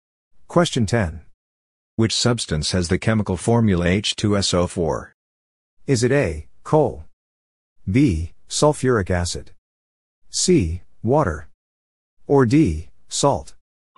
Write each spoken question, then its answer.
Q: Which substance has the chemical formula H2SO4?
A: The answer is B. Sulfuric acid.